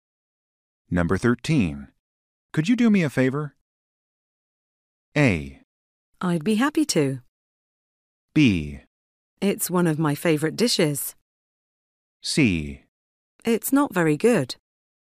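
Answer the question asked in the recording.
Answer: A: I'd be happy to.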